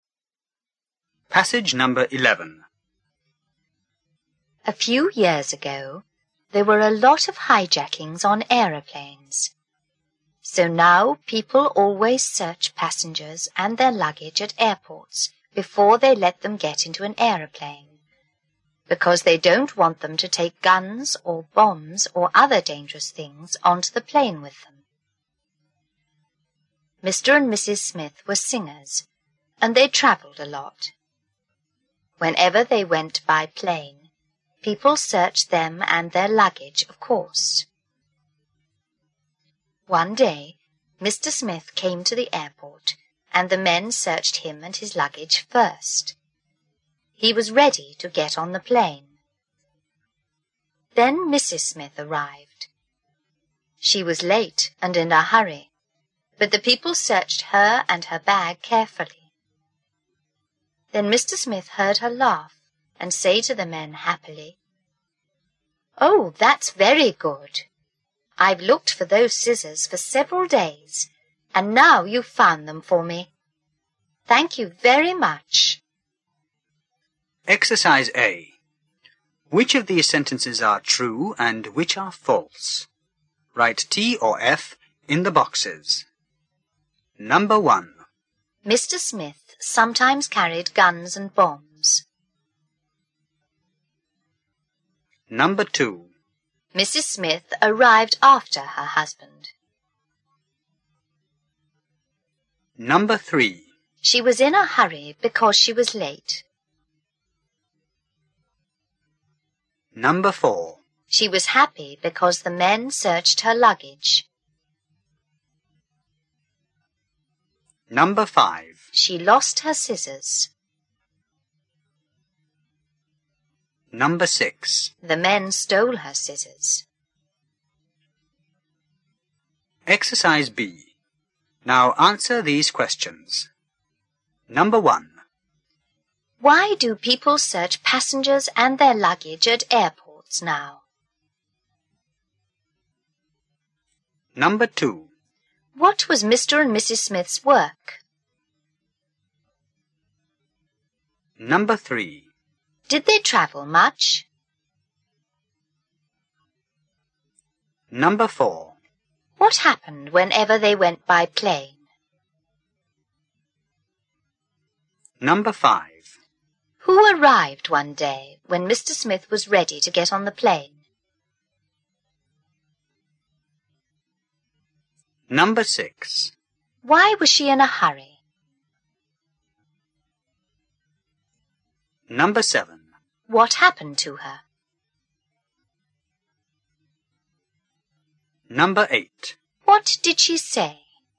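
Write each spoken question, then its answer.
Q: Why do people search passengers and their luggage at airports now?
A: Because they don't want them to take guns, bombs or other dangerous things onto the plane

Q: What was Mr. and Mrs. Smith's work?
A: They were singers

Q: Did they travel much?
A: Yes, they travelled a lot

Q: What happened whenever they went by plane?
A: People searched them and their luggage

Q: Who arrived one day when Mr.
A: Mrs. Smith

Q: Why was she in a hurry?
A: Because she was late

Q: What happened to her?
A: The men searched her and her bag carefully

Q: What did she say?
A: Oh, that's very good. I've looked for those scissors for several days, and now you've found them for me. Thank you very much.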